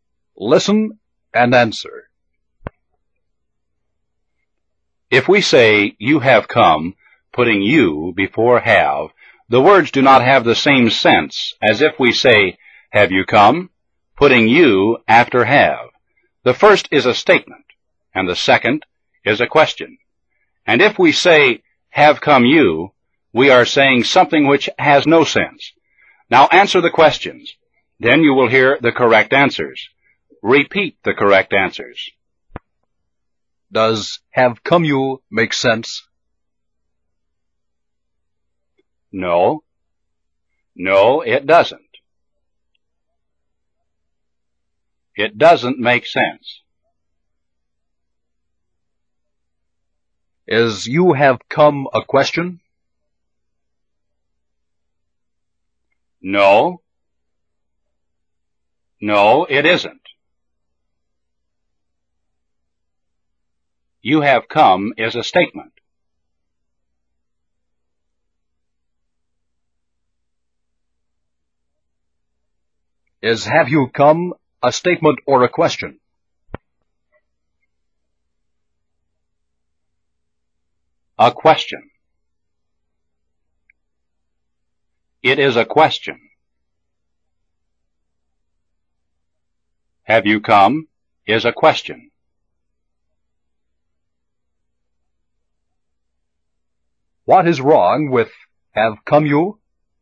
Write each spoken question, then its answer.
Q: Does have come you make sense?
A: No. No, it doesn't. It doesn't make sense.

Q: Is you have come a question?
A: No. No, it isn't.

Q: Is have you come a statement or a question?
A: A question. It is a question.

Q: What is wrong with have come you?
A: The word order. The word order is wrong.